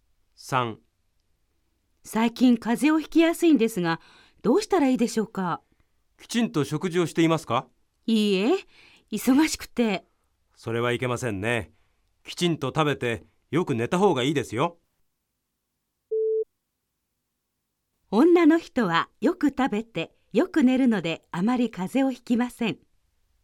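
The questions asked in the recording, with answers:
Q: 女の人はよく食べてよく寝るのであまり風邪をひきません。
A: ×(正しくない)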